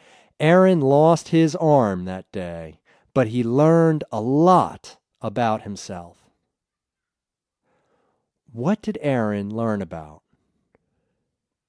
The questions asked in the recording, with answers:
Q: What did Aaron learn about?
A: He learned about himself.